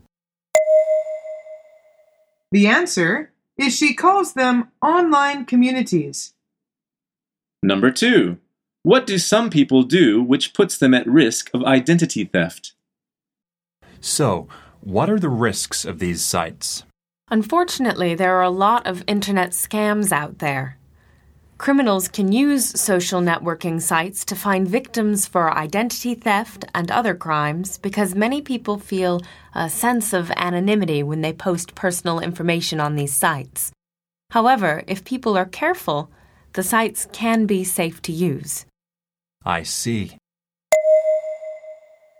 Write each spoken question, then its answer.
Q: What do some people do which puts them at risk of identity theft?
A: The answer is they post personal information.